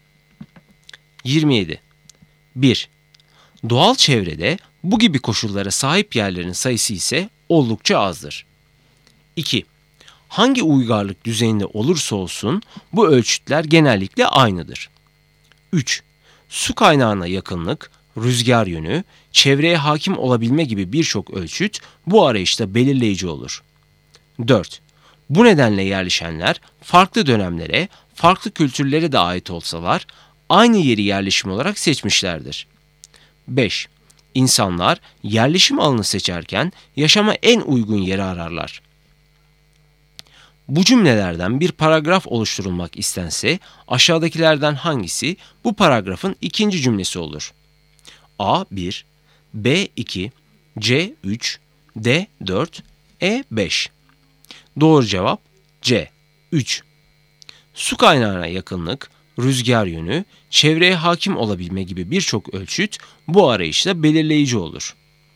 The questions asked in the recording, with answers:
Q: Bu cümlelerden bir paragraf oluşturulmak istense aşağıdakilerden hangisi bu paragrafın ikinci cümlesi olur?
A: Doğru cevap C. 3